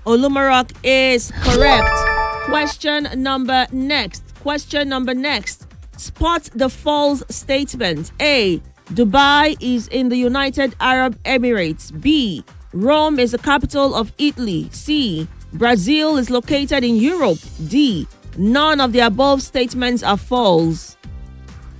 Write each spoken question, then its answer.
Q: Spot the false statement.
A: That is correct.